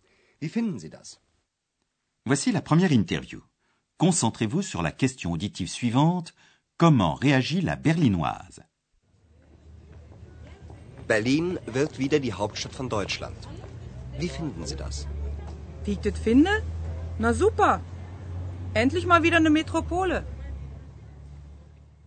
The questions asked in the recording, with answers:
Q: Comment réagit la Berlinoise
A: Dans son authentique dialecte berlinois, elle exprime sa satisfaction.